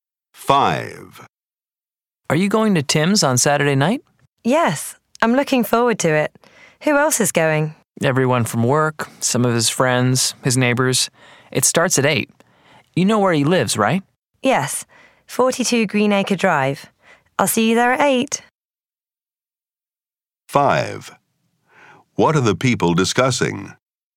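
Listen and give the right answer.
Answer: A party at Tim's on Saturday night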